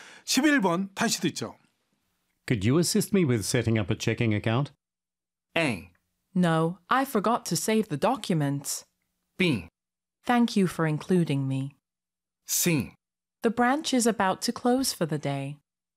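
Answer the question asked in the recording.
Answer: C: The branch is about to close for the day.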